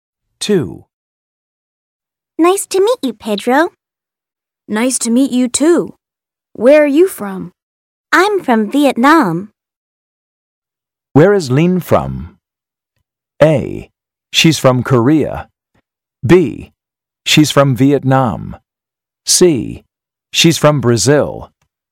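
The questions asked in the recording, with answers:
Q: Where is Lin from?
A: B: She's from Vietnam.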